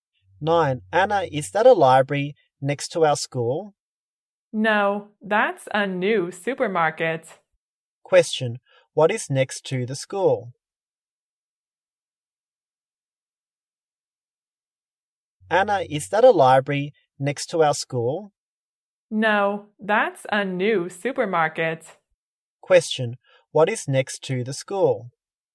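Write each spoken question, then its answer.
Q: Question, what is next to the school?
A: A new supermarket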